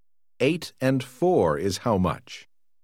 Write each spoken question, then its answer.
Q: 8 and 4 is how much?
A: 12.